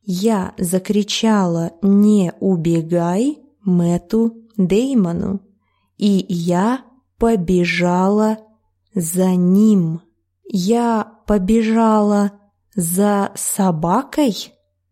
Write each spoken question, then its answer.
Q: Я побежала за собакой?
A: Нет, я побежала за ним, за Мэттом Деймоном.